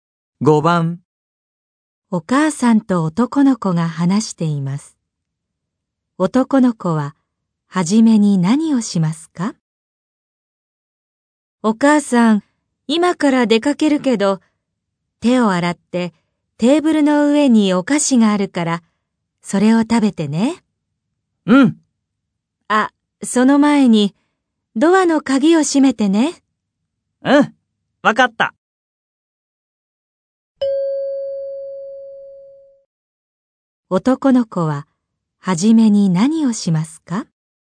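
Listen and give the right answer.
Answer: ドアの鍵を閉める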